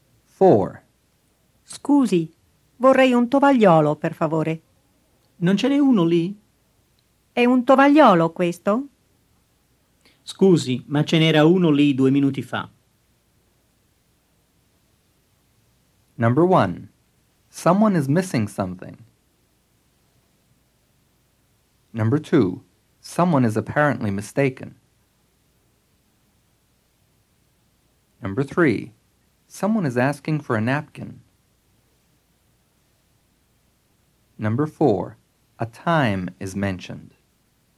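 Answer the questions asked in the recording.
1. True
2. True
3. True
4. True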